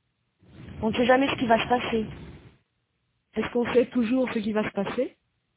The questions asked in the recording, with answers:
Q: Est-ce qu'on sait toujours ce qui va se passer?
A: Non, on ne sait jamais ce qui va se passer.